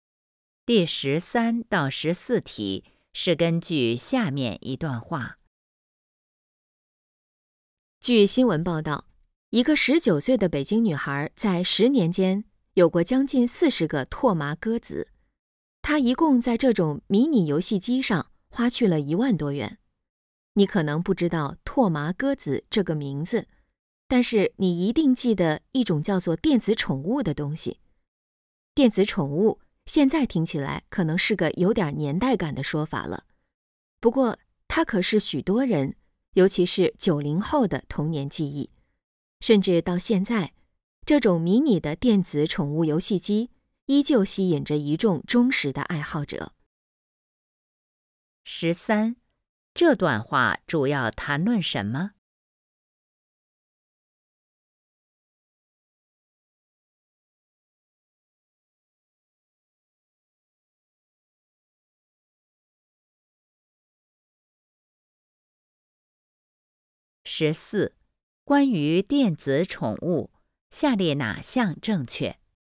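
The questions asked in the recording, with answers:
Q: 这段话主要谈论什么?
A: 电子宠物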